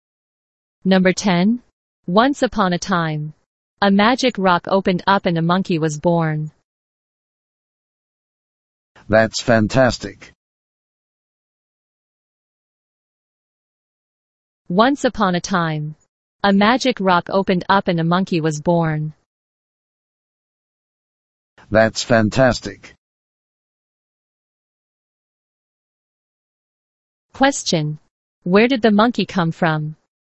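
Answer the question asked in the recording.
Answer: From a magic rock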